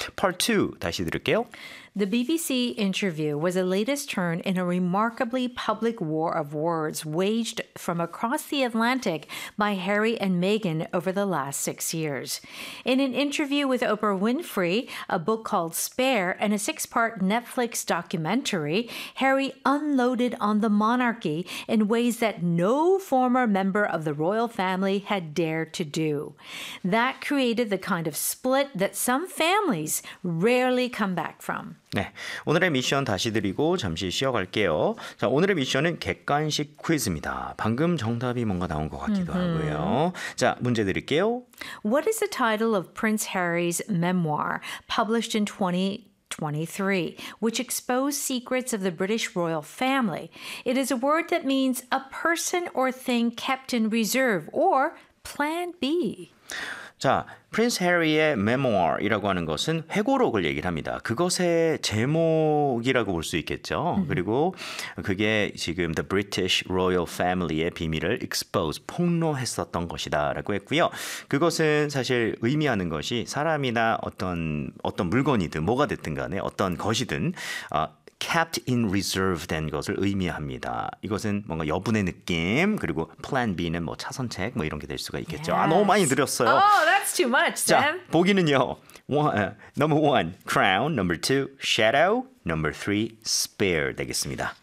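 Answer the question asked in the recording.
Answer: 3: spare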